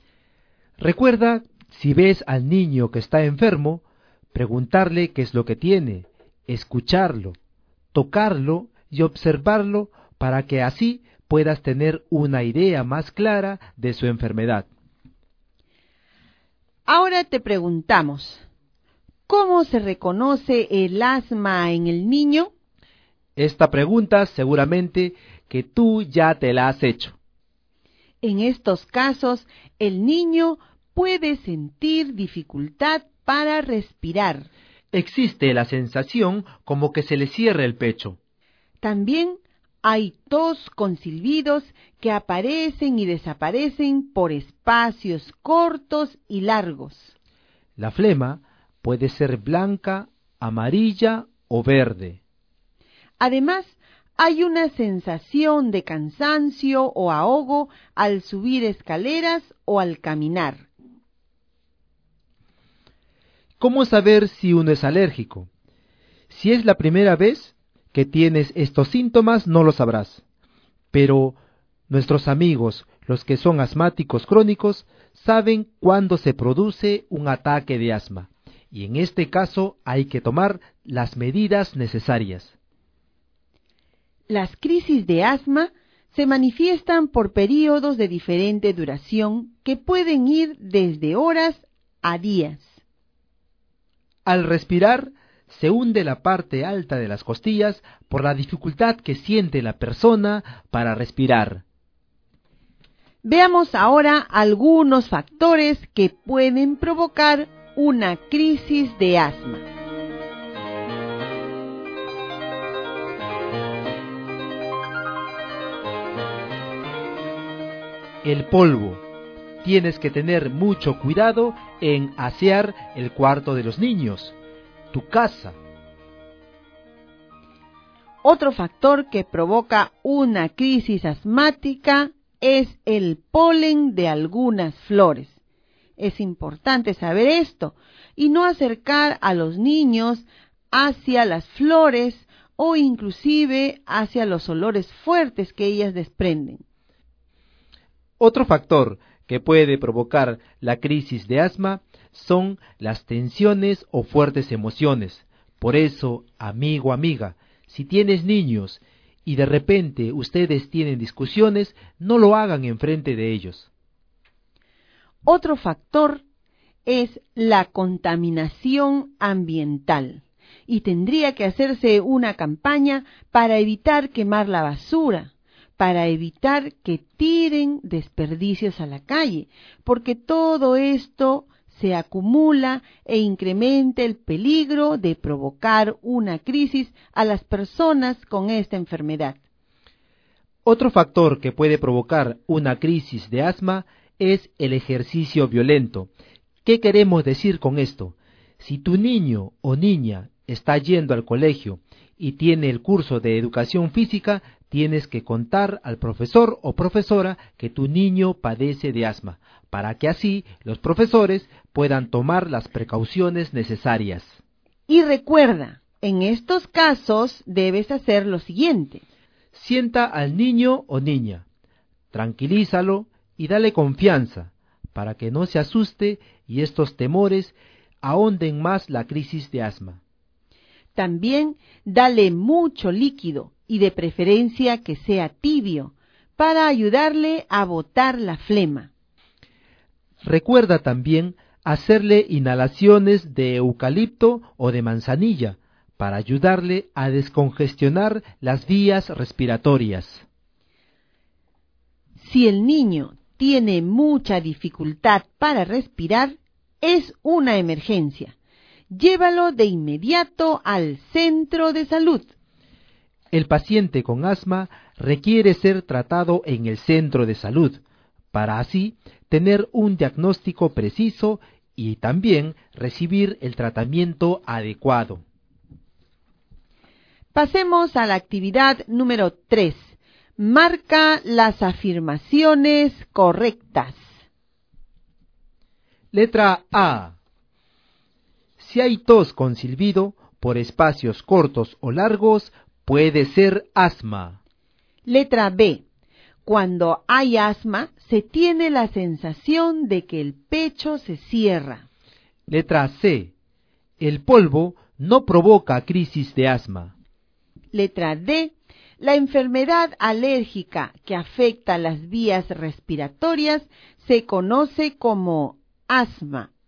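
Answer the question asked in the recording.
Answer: A, B y D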